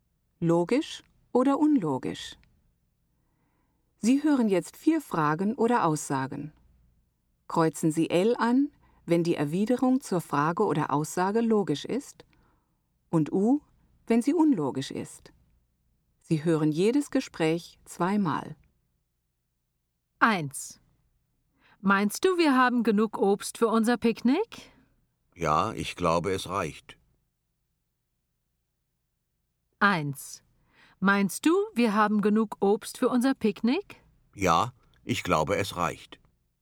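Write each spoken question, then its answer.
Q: Meinst du, wir haben genug Obst für unser Picknick?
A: L: logisch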